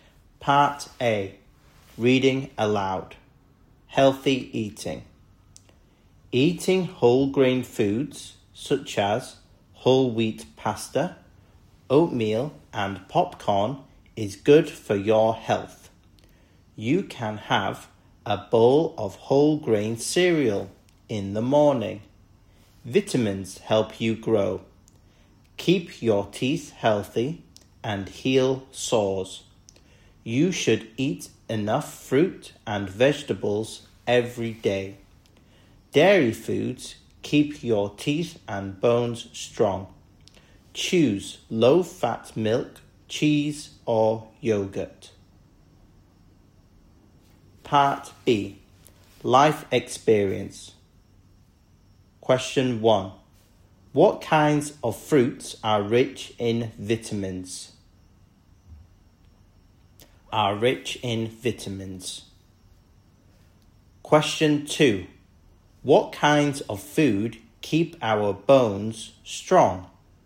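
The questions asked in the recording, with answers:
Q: What kinds of food keep our bones strong?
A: Dairy foods, such as low-fat milk, cheese or yogurt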